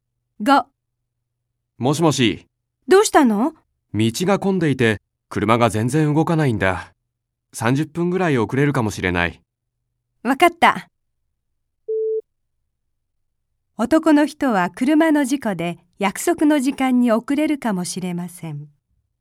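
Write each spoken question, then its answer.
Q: 男の人は車の事故で約束の時間に遅れるかもしれません。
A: ×(道が混んでいるから)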